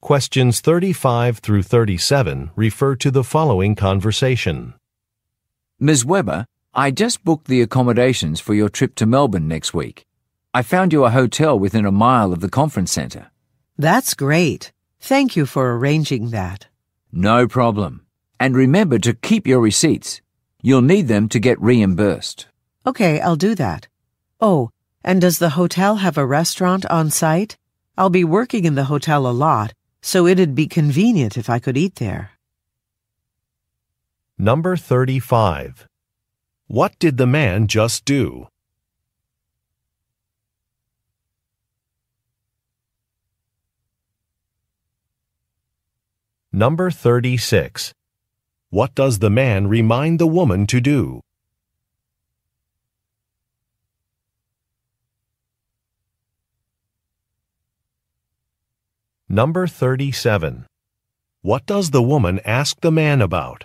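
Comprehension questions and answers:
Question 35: What did the man just do?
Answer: He made a hotel reservation.

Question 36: What does the man remind the woman to do?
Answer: Save her receipts

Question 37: What does the woman ask the man about?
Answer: A restaurant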